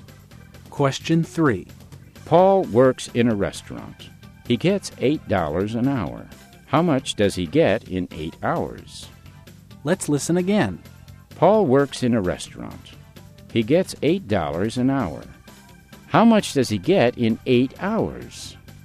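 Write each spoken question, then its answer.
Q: How much does he get in 8 hours?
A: $64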